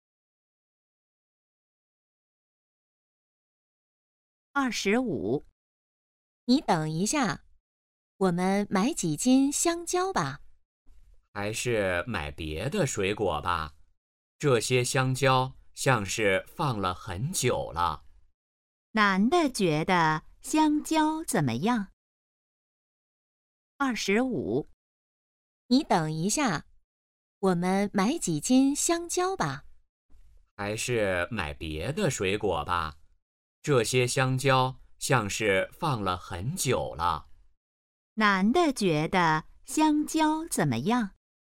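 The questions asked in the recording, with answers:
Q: 男的觉得香蕉怎么样?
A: 放了很久了,不新鲜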